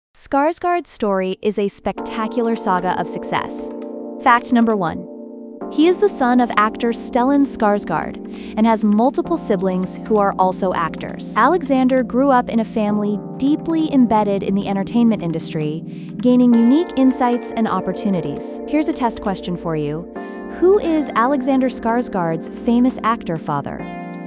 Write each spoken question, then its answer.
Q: Who is Alexander Skarsgård's famous actor father?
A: Correct answer, Stellan Skarsgård.